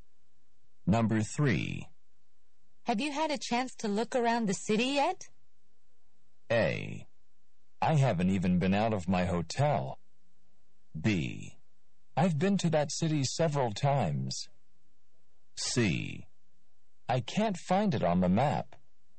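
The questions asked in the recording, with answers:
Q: Have you had a chance to look around the city yet?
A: A: I haven't even been out of my hotel.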